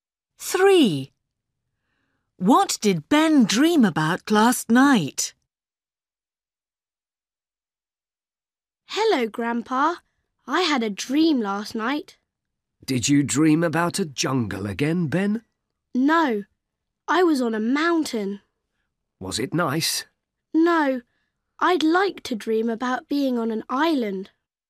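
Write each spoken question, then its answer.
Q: What did Ben dream about last night?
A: Being on a mountain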